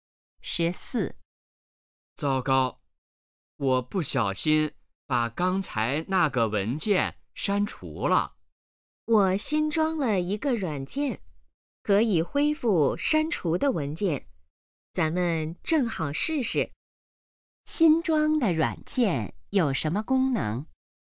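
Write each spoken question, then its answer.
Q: 新装的软件有什么功能?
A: 可以恢复删除的文件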